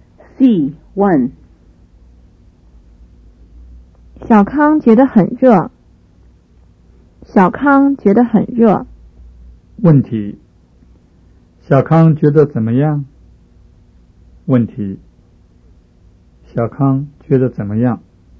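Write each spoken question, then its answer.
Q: 小康觉得怎么样?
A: 很热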